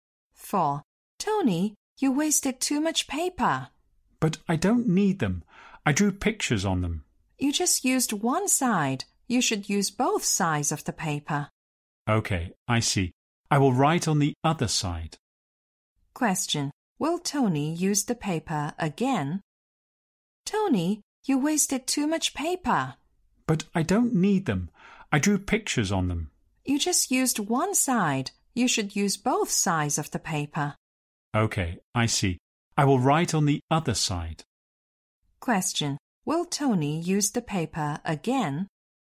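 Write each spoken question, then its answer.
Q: Will Tony use the paper again?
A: Yes, he will write on the other side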